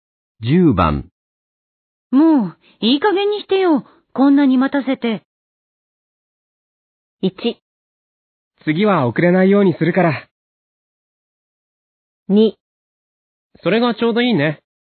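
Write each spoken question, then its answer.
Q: もう、いい加減にしてよ。こんなに待たせて。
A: 1: 次は遅れないようにするから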